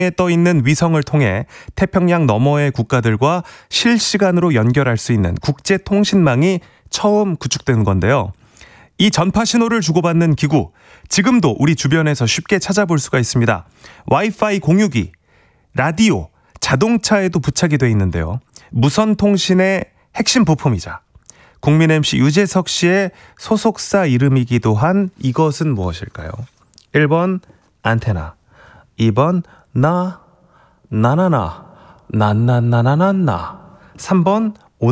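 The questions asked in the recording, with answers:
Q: 무선 통신의 핵심 부품이자 국민 MC 유재석 씨의 소속사 이름이기도 한 이것은 무엇일까요?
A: 1번: 안테나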